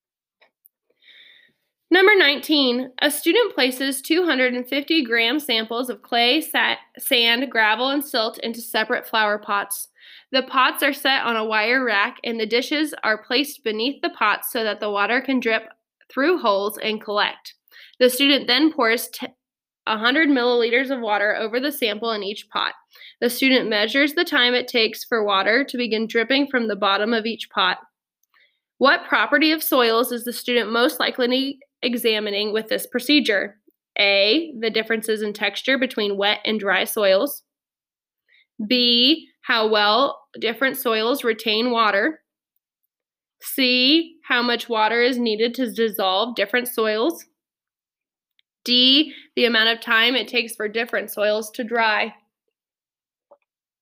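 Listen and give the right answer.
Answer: B: how well different soils retain water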